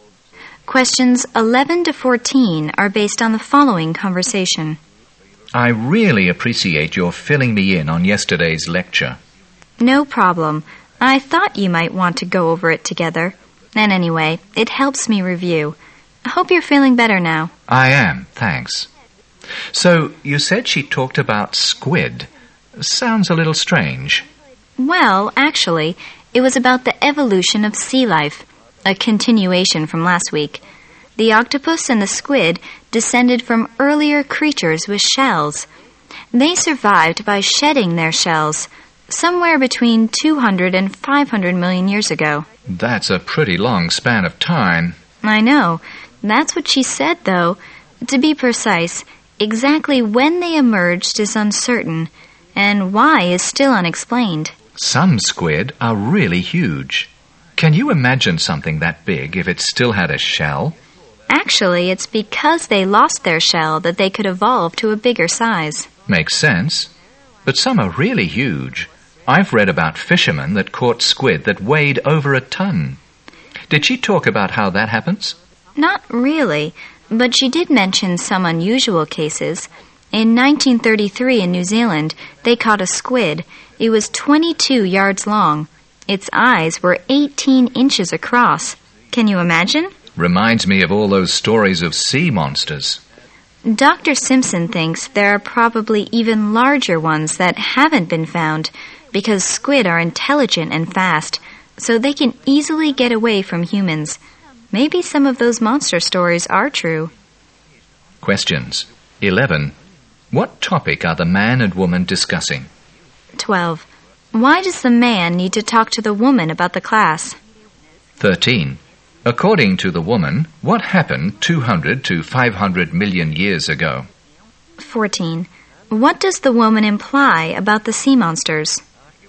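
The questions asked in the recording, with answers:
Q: What topic are the man and woman discussing?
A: Yesterday's lecture on the evolution of sea life (squid)

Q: Why does the man need to talk to the woman about the class?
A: He missed yesterday's lecture because he was ill

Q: According to the woman, what happened 200 to 500 million years ago?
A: The octopus and squid shed their shells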